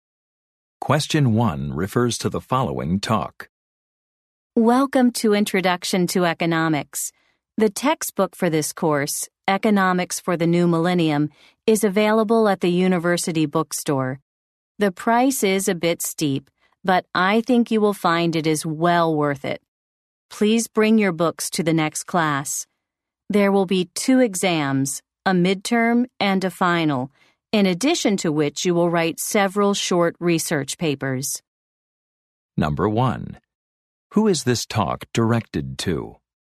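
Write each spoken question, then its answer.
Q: Who is this talk directed to?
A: Students in an economics course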